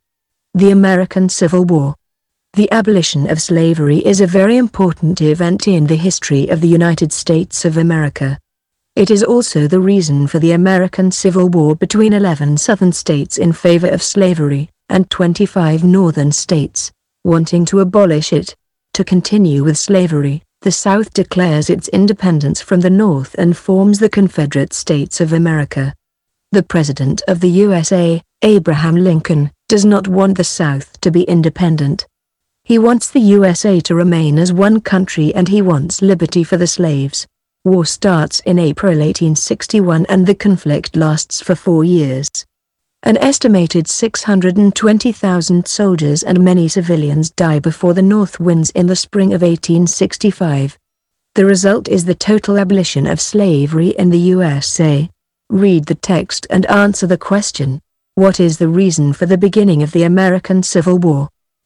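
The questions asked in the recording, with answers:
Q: What is the reason for the beginning of the American Civil War?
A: The abolition of slavery (the South wanted to keep slavery, the North wanted to abolish it)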